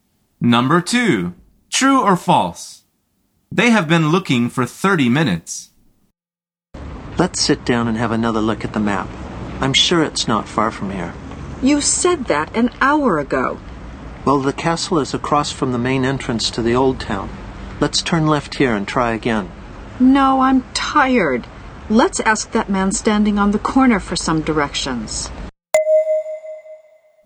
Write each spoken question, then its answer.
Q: They have been looking for 30 minutes.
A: The answer is false.